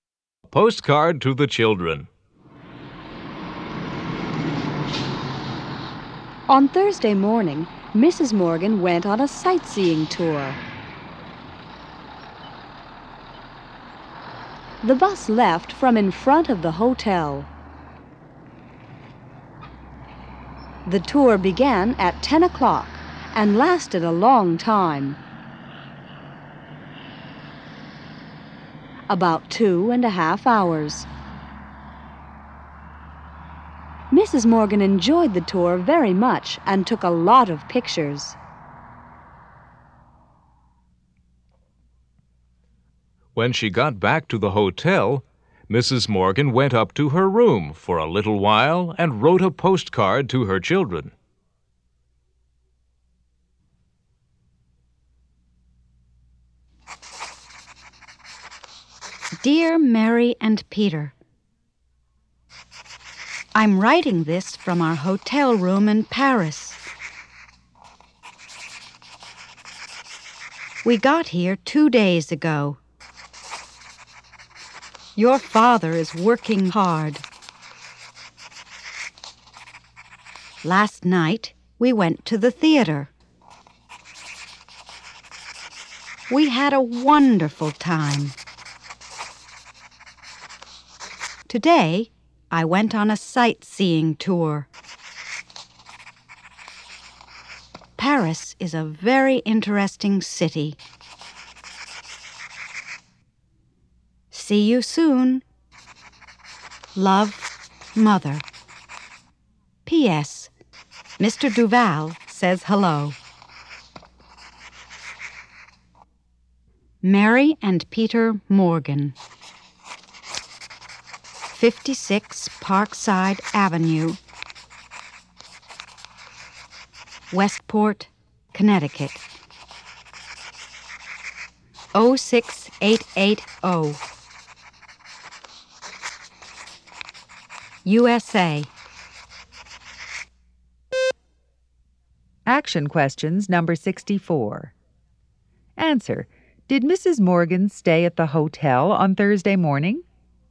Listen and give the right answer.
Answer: No, she didn't.